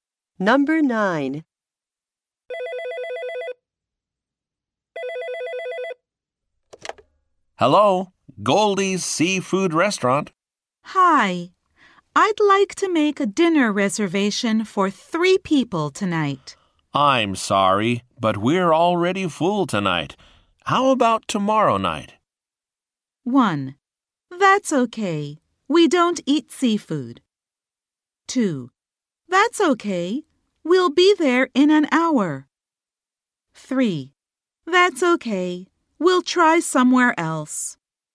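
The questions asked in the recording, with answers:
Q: How about tomorrow night?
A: 3: That's okay. We'll try somewhere else.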